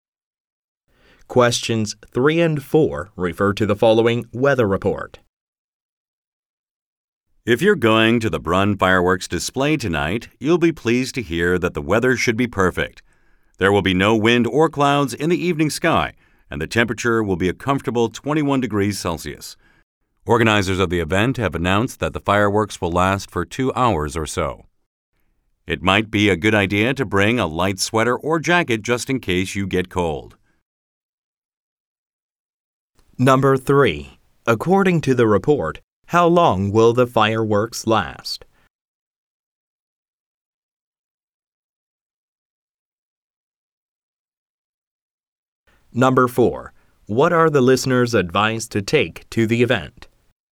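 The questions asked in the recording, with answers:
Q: According to the report, how long will the fireworks last?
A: About 2 hours

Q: What are the listeners' advice to take to the event?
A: A light sweater or jacket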